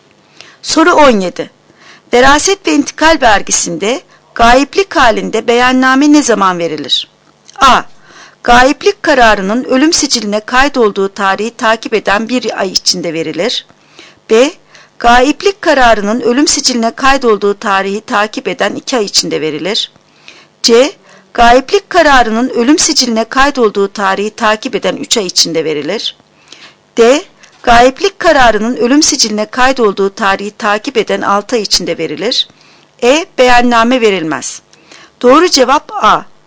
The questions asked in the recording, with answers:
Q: Veraset ve intikal vergisinde gayiplik halinde beyanname ne zaman verilir?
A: Doğru cevap A. Gayiplik kararının ölüm siciline kaydolduğu tarihi takip eden 1 ay içinde verilir.